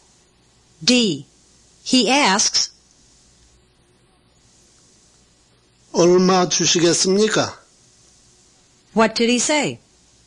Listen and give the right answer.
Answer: He said, How much will you give me?